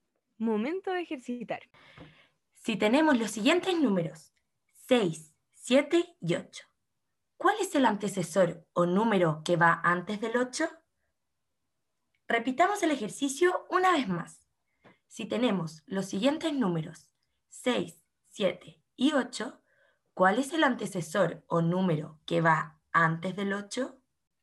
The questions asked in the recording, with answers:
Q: ¿Cuál es el antecesor o número que va antes del 8?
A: el antecesor del número 8 es el número 7